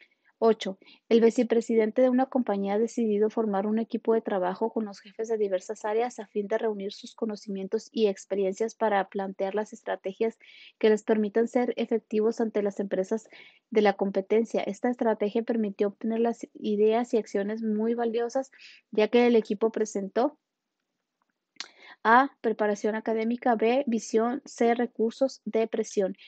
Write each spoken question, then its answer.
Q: Esta estrategia permitió obtener las ideas y acciones muy valiosas, ya que el equipo presentó a, preparación académica, B, visión, C, recursos, D, presión.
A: Y la respuesta correcta es la B, visión.